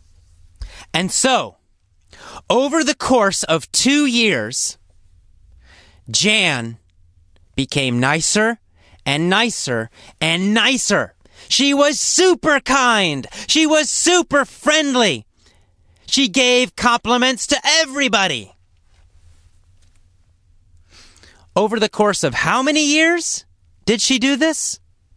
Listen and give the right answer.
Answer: Well, over the course of 2 years.